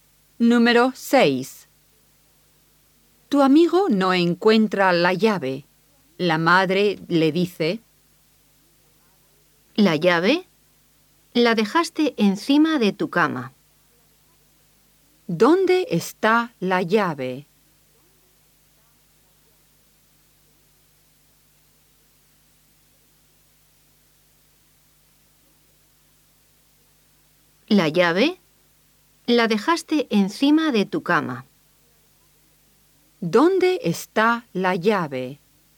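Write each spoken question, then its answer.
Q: ¿Dónde está la llave?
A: Encima de su cama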